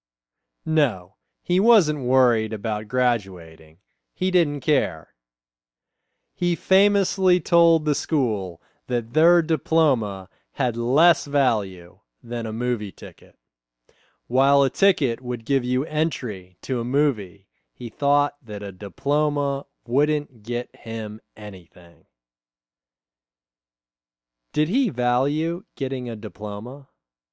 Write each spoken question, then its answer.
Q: Did he value getting a diploma?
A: No, he didn't value getting a diploma.